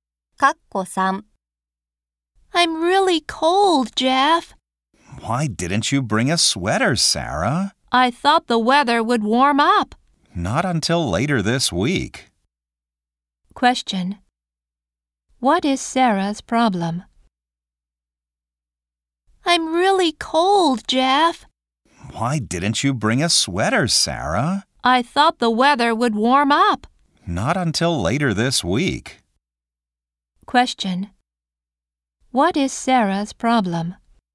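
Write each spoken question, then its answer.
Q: What is Sarah's problem?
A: She is cold because she didn't bring a sweater.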